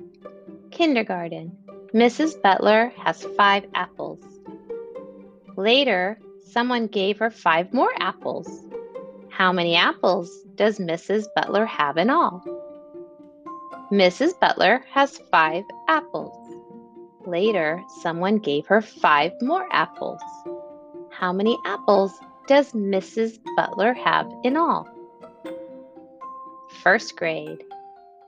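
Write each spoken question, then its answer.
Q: How many apples does Mrs. Butler have in all?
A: 10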